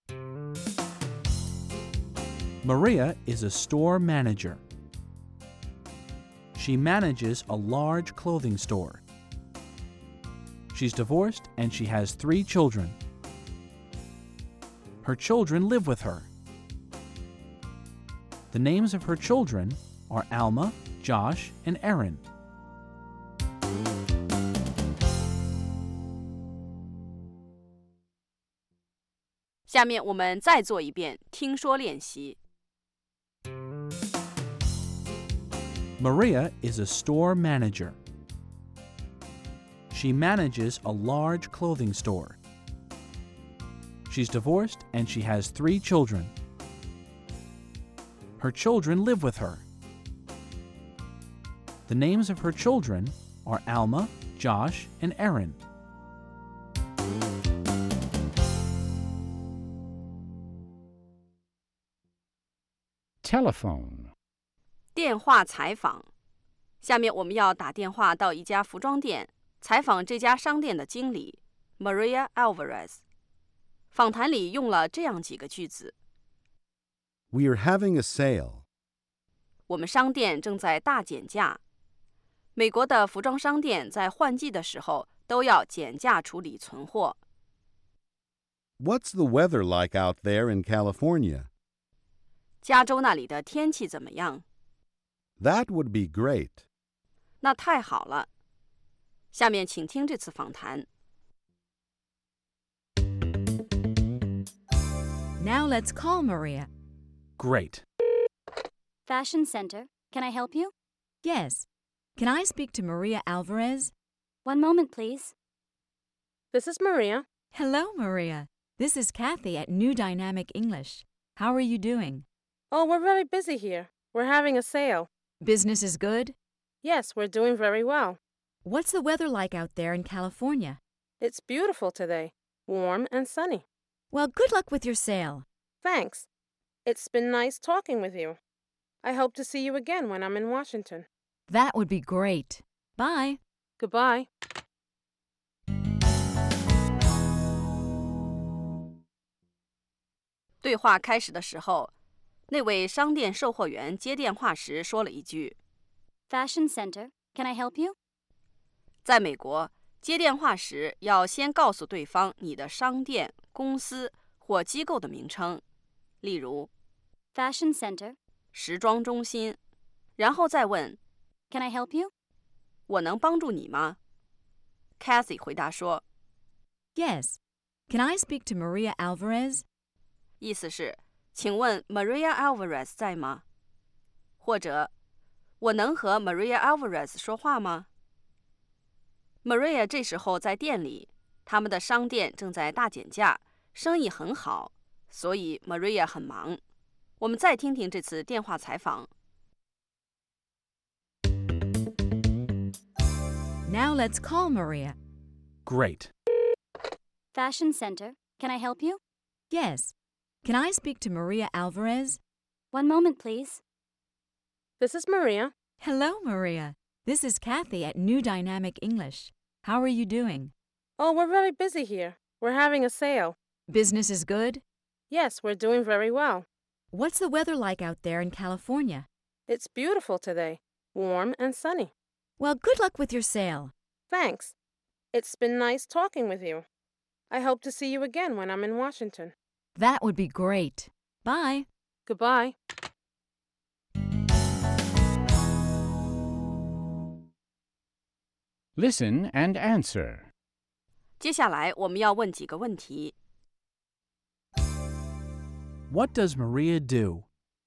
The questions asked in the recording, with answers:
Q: What does Maria do?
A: She's a store manager.